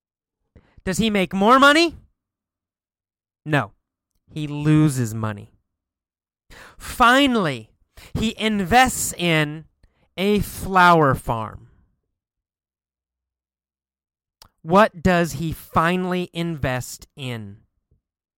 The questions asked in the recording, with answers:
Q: What does he finally invest in?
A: He invests in a flower farm.